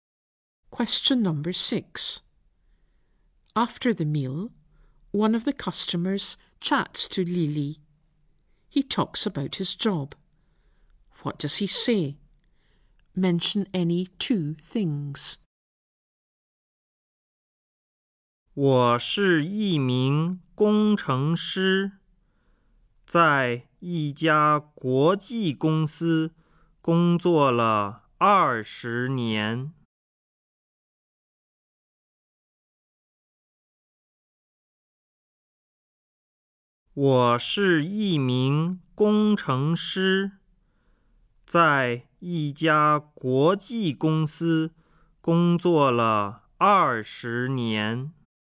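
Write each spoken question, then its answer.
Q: He talks about his job. What does he say?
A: Any two: he is an engineer; he works for an international company; he has worked there for 20 years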